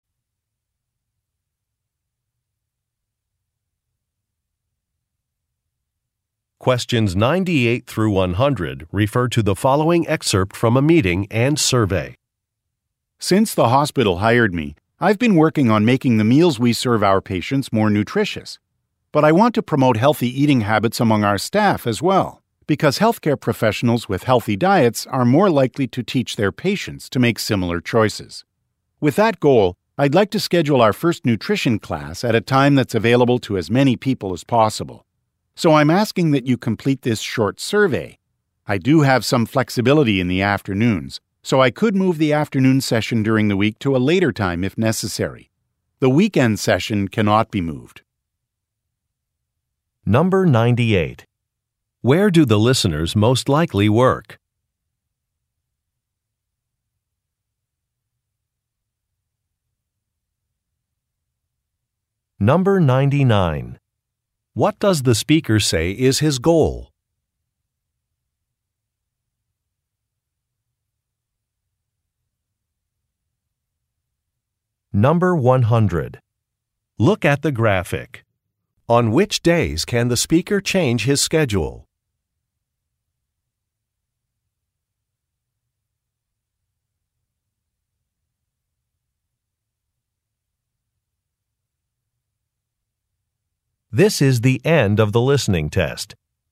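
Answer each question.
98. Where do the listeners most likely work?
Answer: At a hospital

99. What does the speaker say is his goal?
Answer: To encourage healthy eating habits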